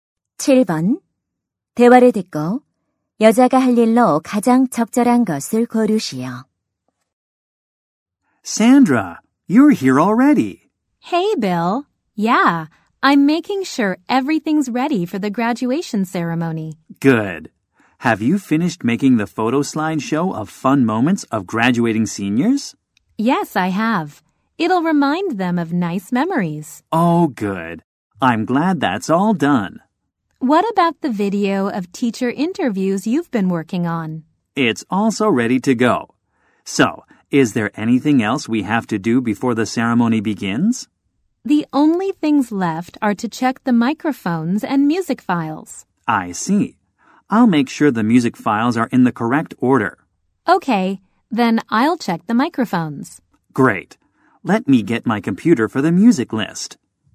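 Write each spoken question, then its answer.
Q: 대화를 듣고 여자가 할 일로 가장 적절한 것을 고르시오.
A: 마이크 점검하기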